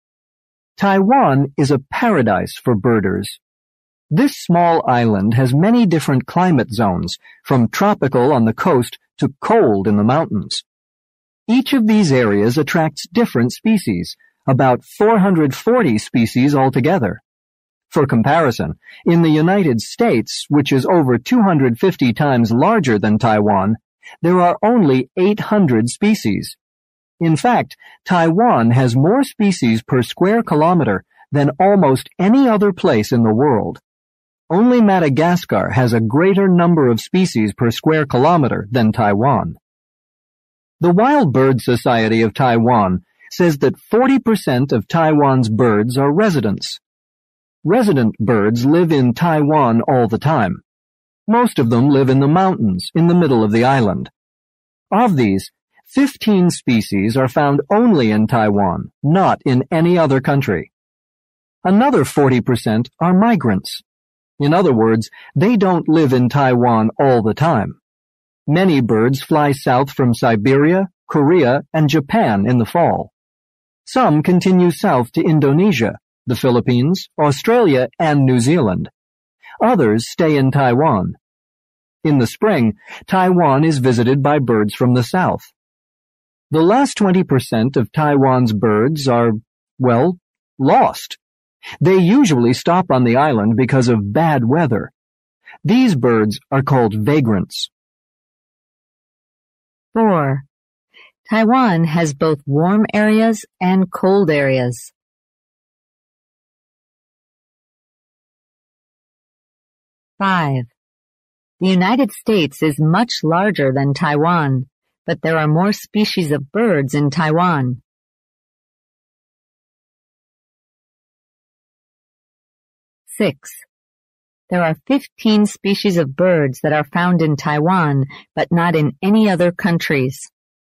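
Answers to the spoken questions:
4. True
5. False
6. True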